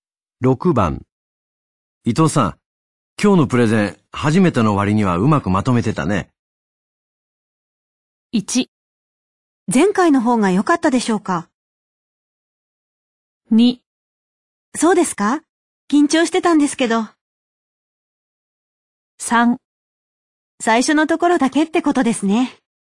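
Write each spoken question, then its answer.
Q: 伊藤さん、今日のプレゼン、初めての割にはうまくまとめてたね。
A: 2: そうですか?緊張してたんですけど。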